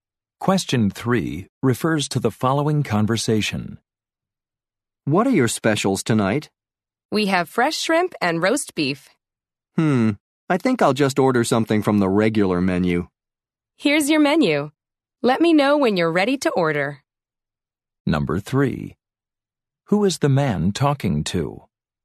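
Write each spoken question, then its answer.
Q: Who is the man talking to?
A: A waiter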